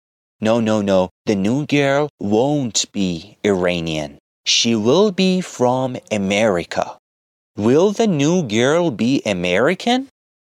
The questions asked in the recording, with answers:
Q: Will the new girl be American?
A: Yes, the new girl will be American because she will be from America.